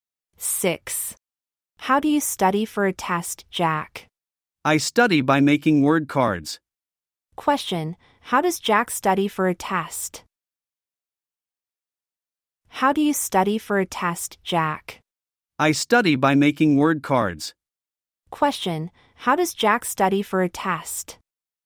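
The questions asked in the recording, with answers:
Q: How does Jack study for a test?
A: By making word cards.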